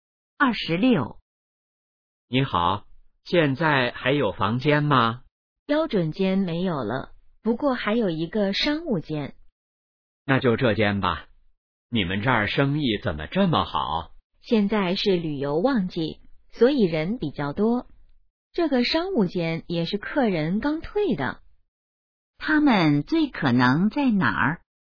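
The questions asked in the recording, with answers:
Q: 他们最可能在哪儿?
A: 宾馆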